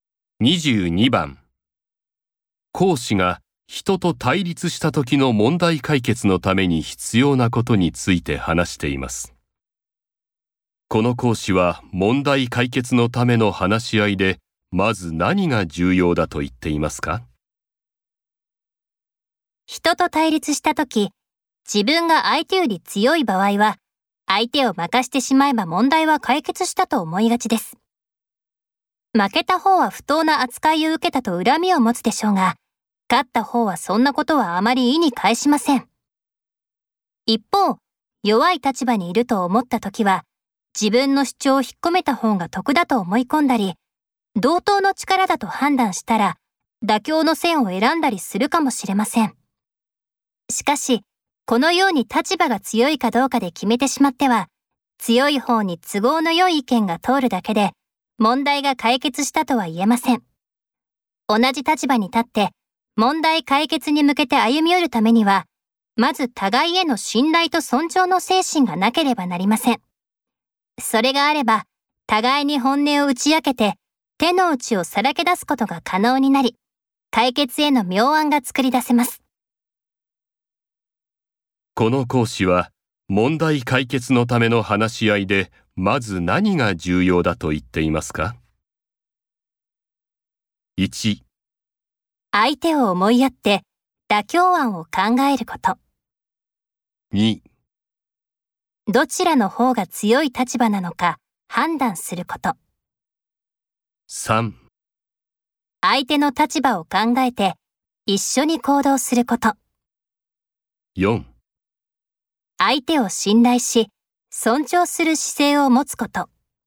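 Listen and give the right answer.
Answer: 4: 相手を信頼し、尊重する姿勢を持つこと。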